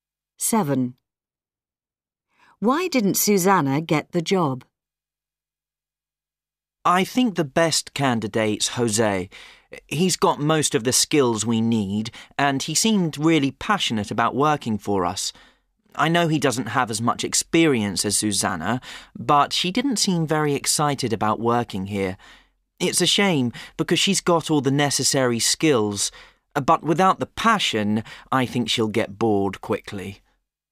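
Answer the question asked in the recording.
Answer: she didn't seem passionate about working there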